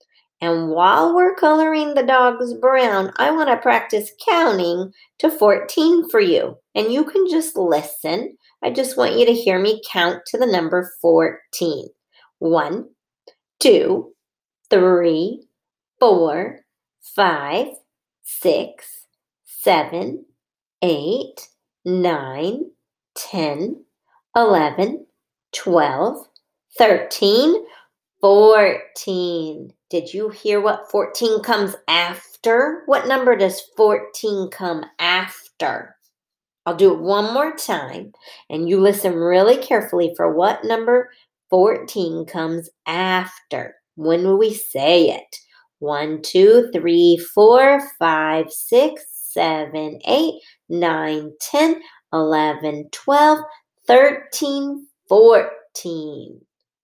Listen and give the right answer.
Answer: Yes, it comes after the number 13.